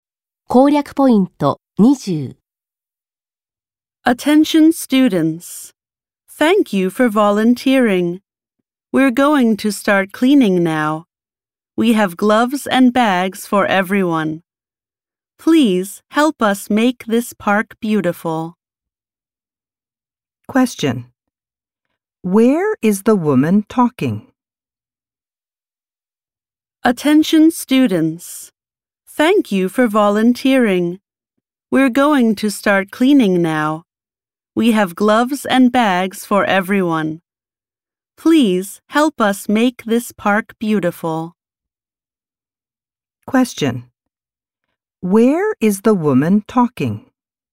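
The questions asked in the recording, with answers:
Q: Where is the woman talking?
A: In a park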